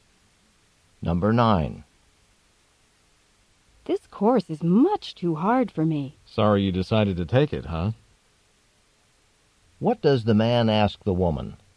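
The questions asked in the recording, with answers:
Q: What does the man ask the woman?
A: Whether she regrets deciding to take the course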